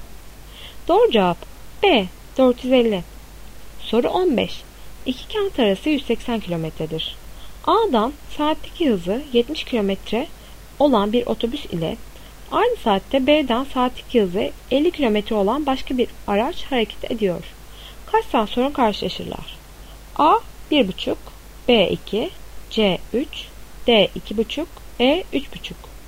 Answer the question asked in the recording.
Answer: Doğru cevap A 1,5.